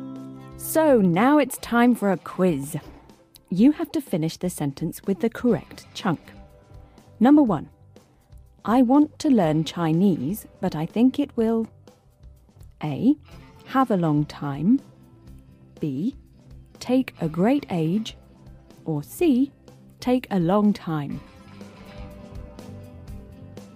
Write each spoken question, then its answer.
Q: I want to learn Chinese, but I think it will A. Have a long time. B. Take a great age. Or C. Take a long time.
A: The natural way to say it is C. Take a long time.